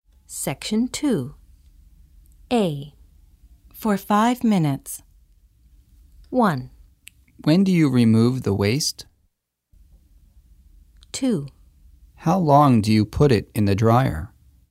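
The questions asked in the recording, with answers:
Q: For 5 minutes.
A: 2: How long do you put it in the dryer?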